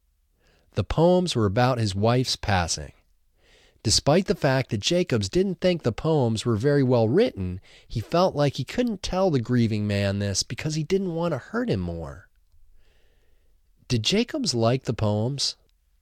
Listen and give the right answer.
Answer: No, Jacobs didn't like the poems.